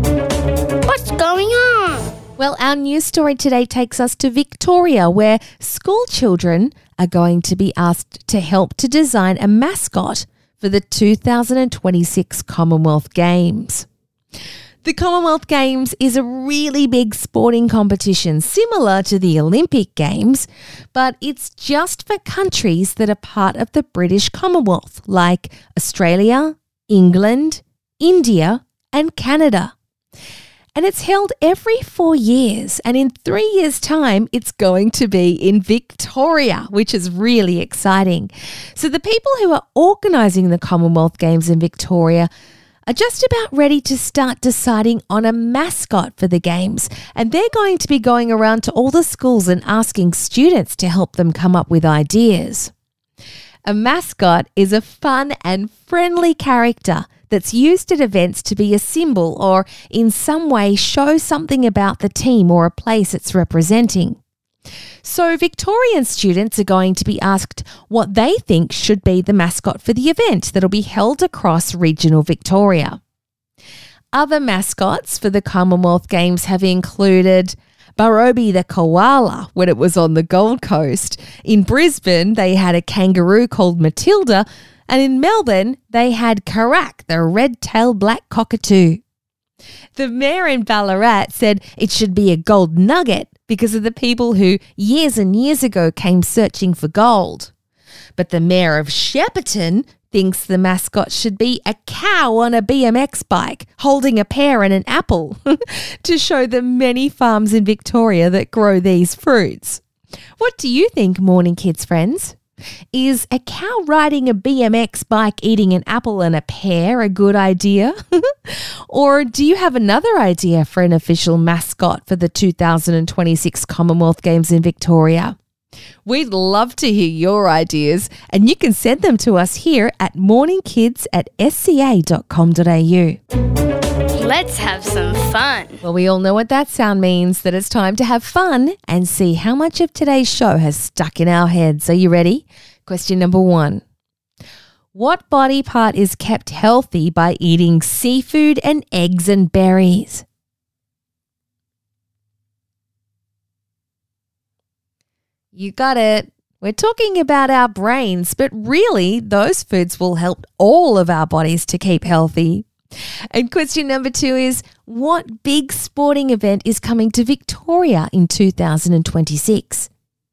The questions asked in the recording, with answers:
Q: what big sporting event is coming to Victoria in 2026?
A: It's the Commonwealth Games.